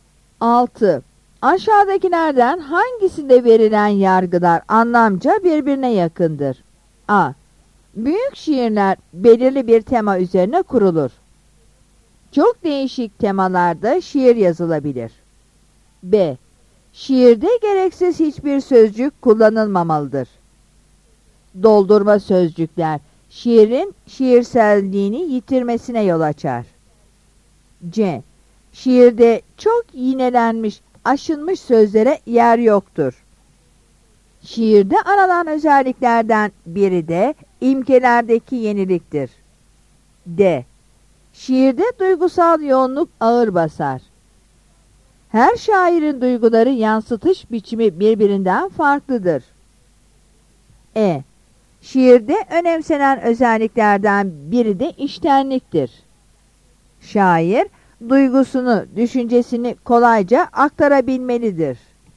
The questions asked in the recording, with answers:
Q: Aşağıdakilerden hangisinde verilen yargılar anlamca birbirine yakındır?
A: Yanıt B'dir.